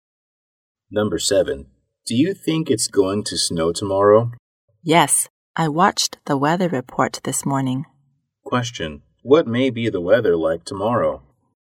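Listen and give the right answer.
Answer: Snowy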